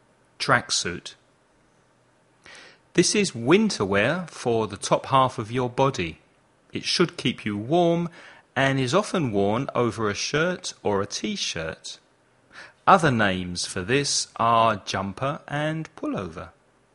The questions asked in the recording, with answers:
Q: This is winter wear for the top half of your body.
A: Sweater.